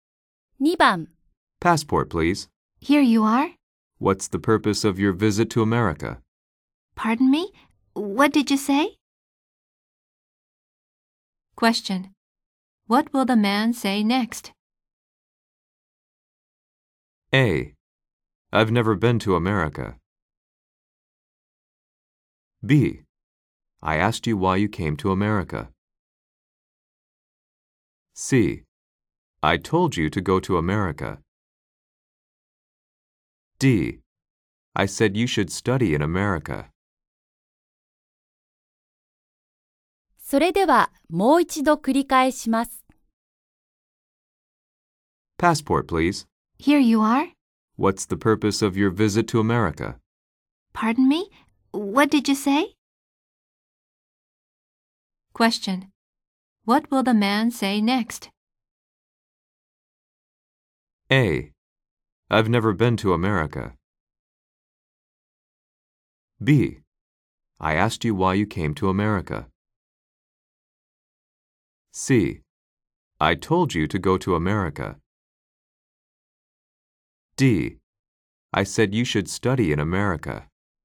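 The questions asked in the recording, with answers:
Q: What will the man say next?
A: B: I asked you why you came to America.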